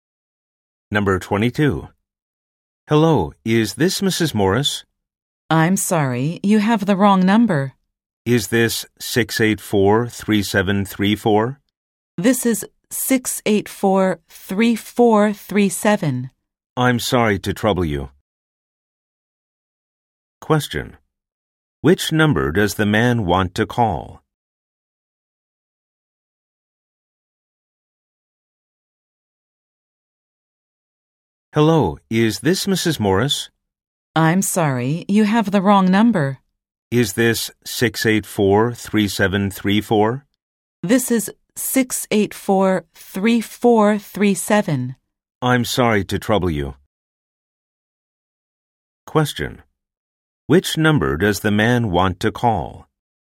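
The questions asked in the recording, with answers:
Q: Which number does the man want to call?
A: 684-3734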